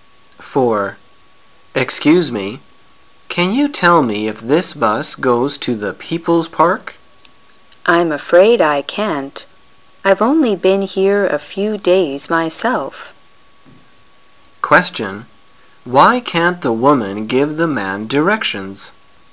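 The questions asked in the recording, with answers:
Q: Why can't the woman give the man directions?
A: She has only been there a few days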